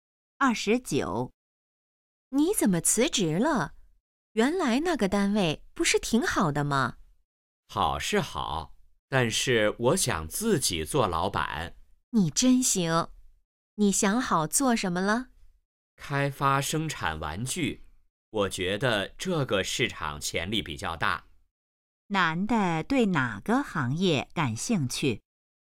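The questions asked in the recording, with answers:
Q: 男的对哪个行业感兴趣?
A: 玩具行业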